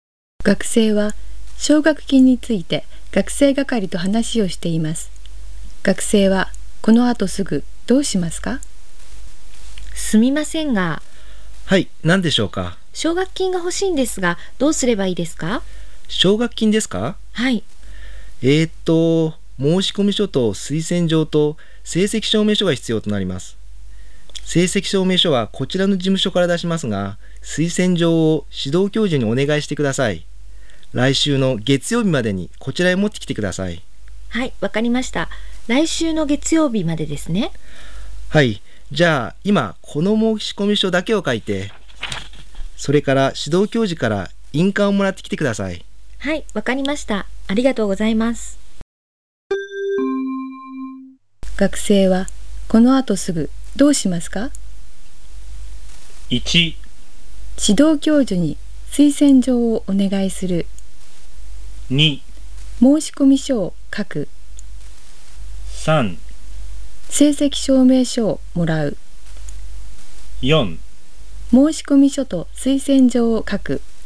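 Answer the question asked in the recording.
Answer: 2: 申し込み書を書く。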